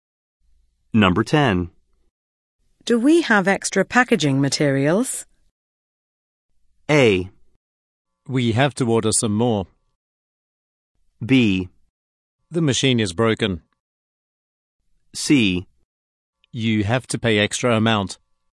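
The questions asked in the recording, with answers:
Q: Do we have extra packaging materials?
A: A: We have to order some more.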